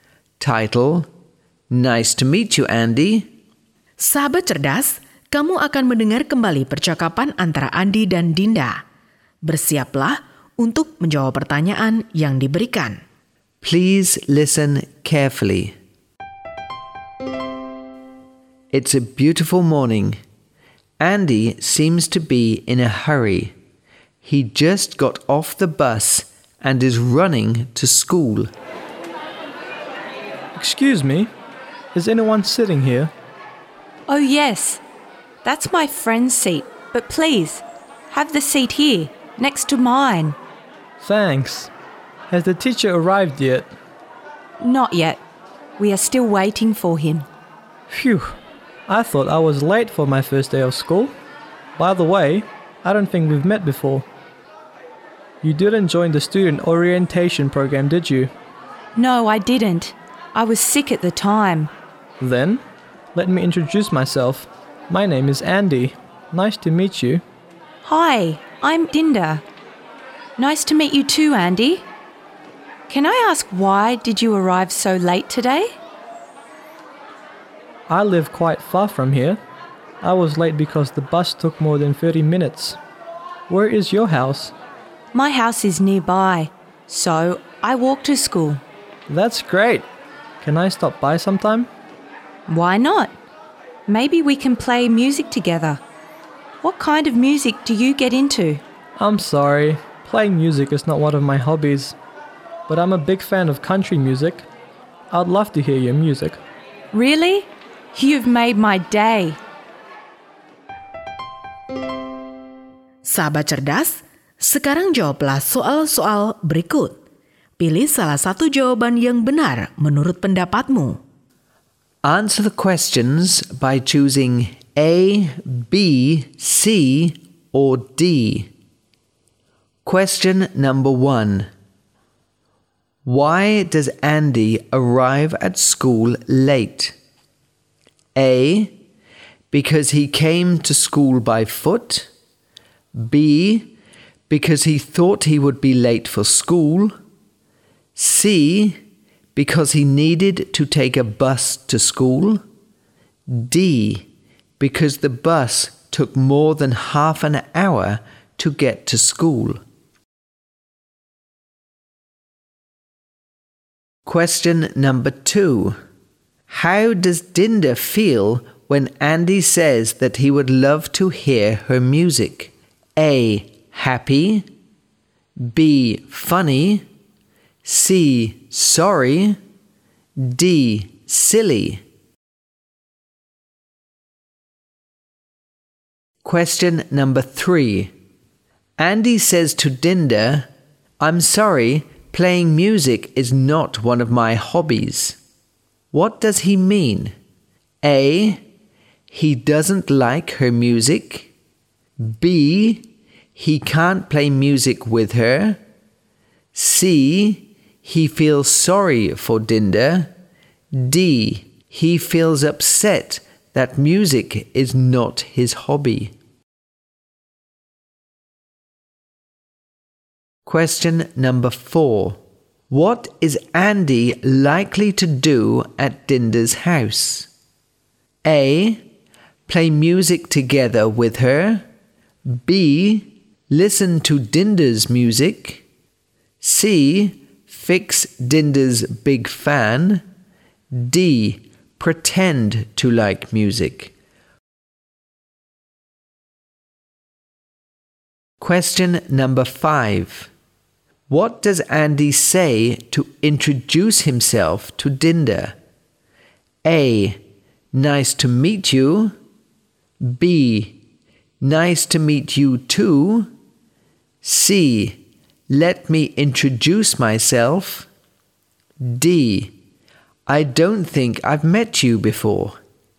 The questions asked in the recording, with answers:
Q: Why does Andy arrive at school late?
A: D. Because the bus took more than half an hour to get to school.

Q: How does Dinda feel when Andy says that he would love to hear her music?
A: A. Happy.

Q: Andy says to Dinda, I'm sorry, playing music is not one of my hobbies. What does he mean?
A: B. He can't play music with her.

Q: What is Andy likely to do at Dinda's house?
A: B. Listen to Dinda's music.